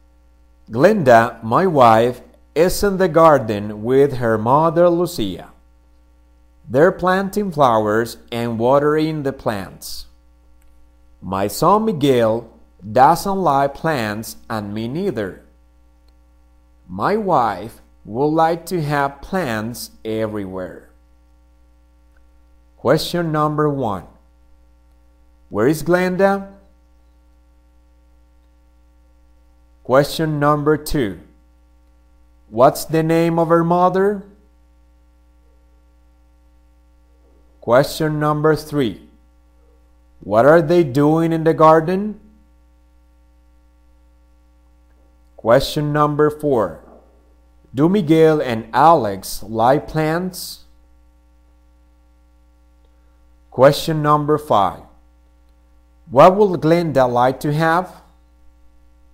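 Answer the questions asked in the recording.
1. In the garden
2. Lucia
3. Planting flowers and watering the plants
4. No
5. Plants everywhere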